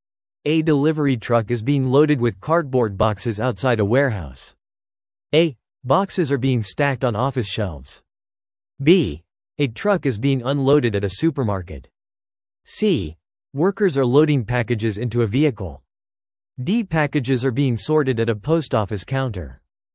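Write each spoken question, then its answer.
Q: A delivery truck is being loaded with cardboard boxes outside a warehouse.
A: C: Workers are loading packages into a vehicle.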